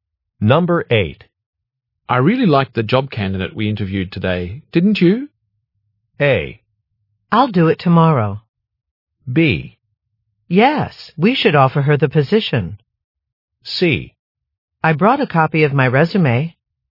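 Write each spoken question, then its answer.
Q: I really liked the job candidate we interviewed today, didn't you?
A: B: Yes, we should offer her the position.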